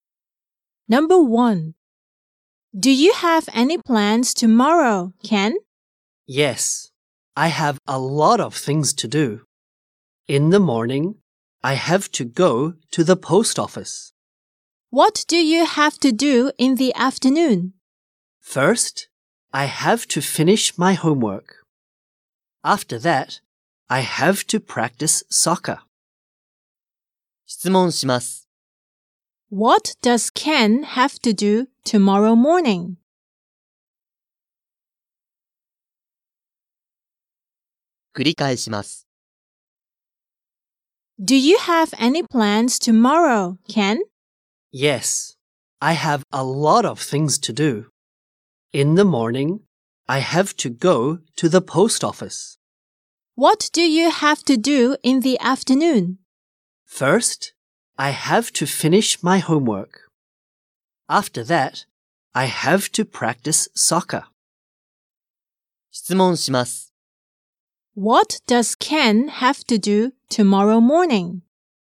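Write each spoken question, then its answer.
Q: What does Ken have to do tomorrow morning?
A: He has to go to the post office.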